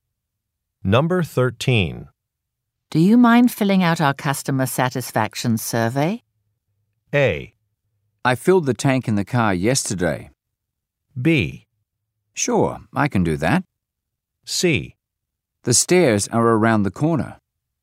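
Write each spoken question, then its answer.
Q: Do you mind filling out our customer satisfaction survey?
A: B: Sure, I can do that.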